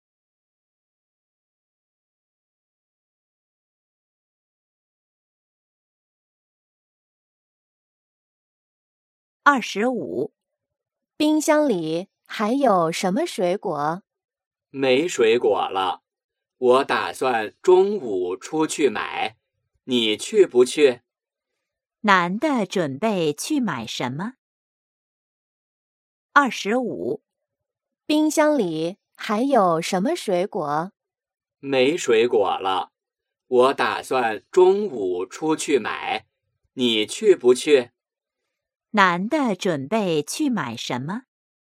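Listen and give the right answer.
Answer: 水果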